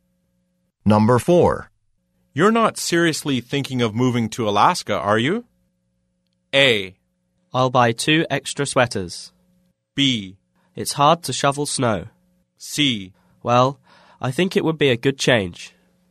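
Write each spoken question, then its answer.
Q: You're not seriously thinking of moving to Alaska, are you?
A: C: Well, I think it would be a good change.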